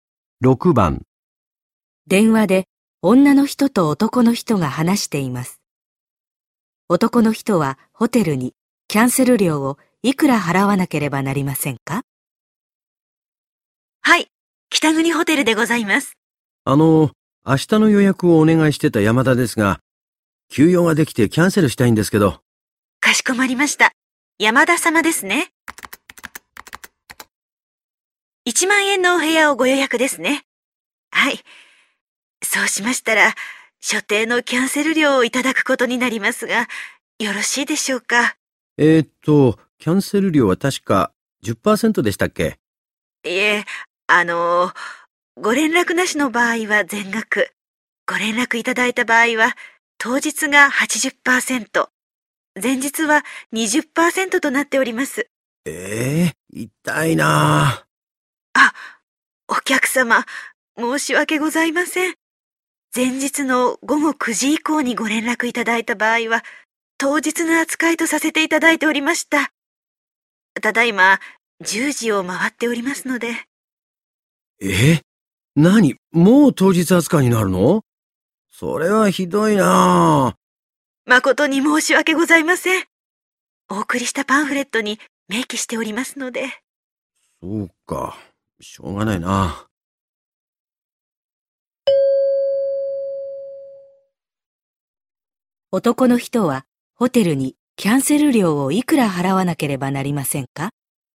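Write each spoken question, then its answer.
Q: 男の人はホテルにキャンセル料をいくら払わなければなりませんか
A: 8000円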